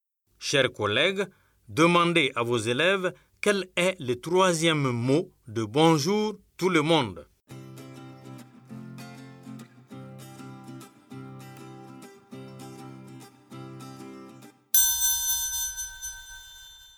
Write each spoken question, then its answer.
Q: Chers collègues, demandez à vos élèves quel est le troisième mot de bonjour tout le monde.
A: J'espère que vos élèves ont dit le.